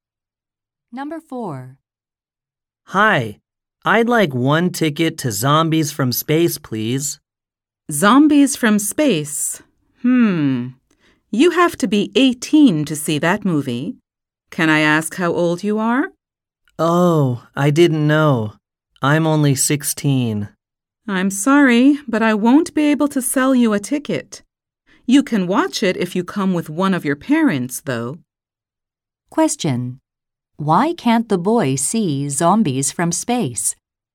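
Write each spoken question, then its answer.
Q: Why can't the boy see Zombies from Space?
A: He is under 18.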